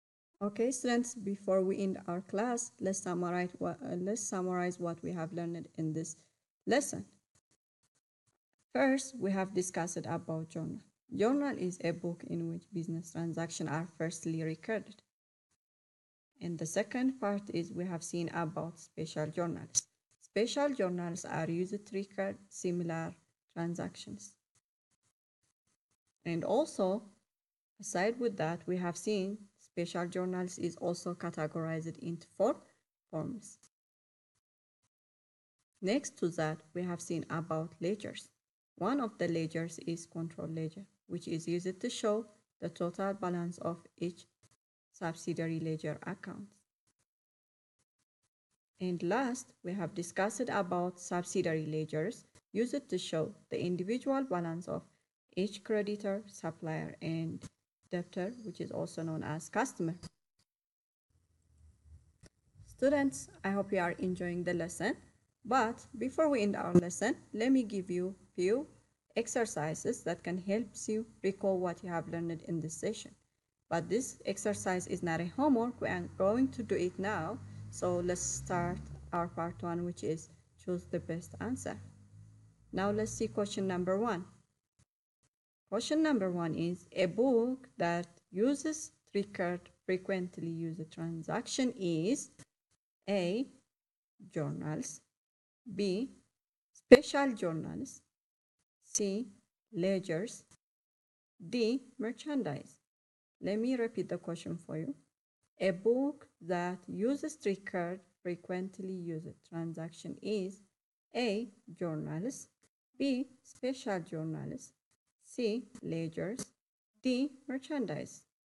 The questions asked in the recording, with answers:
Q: A book that uses three-card frequently used transaction is A, journals, B, special journals, C, ledgers, D, merchandise.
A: Answer for question number one is B, special journals.